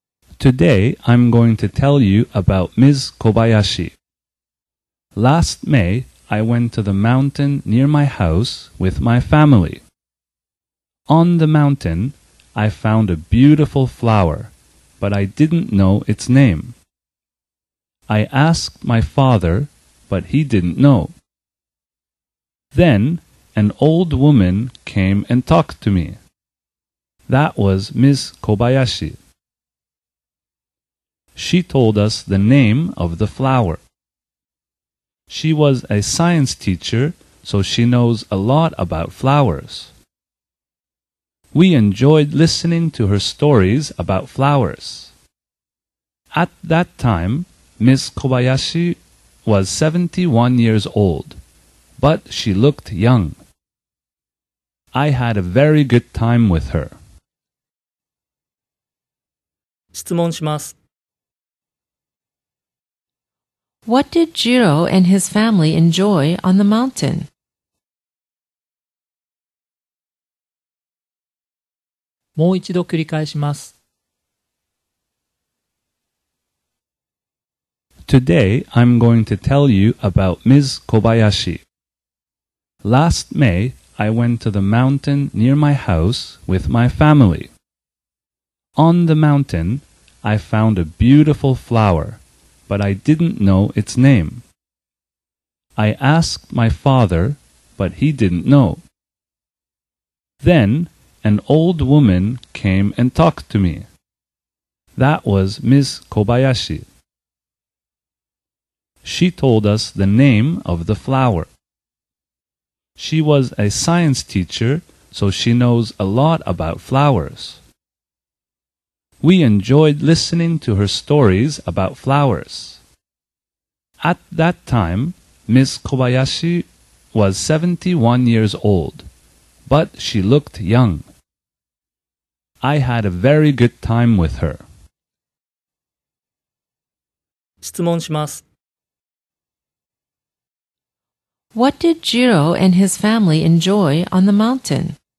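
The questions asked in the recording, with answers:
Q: What did Jiro and his family enjoy on the mountain?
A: Listening to Ms. Kobayashi's stories about flowers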